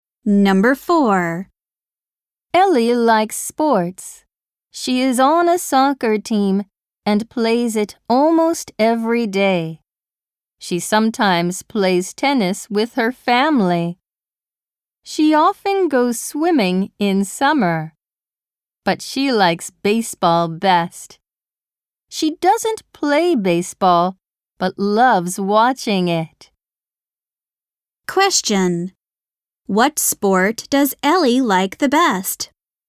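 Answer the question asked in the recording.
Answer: Baseball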